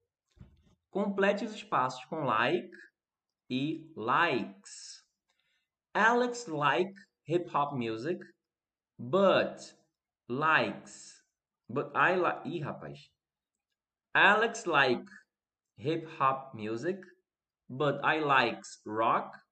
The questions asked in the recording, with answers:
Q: Complete os espaços com like e likes.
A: likes e depois like